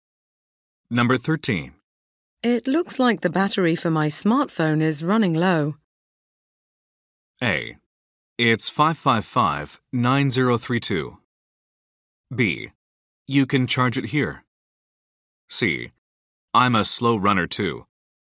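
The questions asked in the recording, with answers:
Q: It looks like the battery for my smartphone is running low.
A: B: You can charge it here.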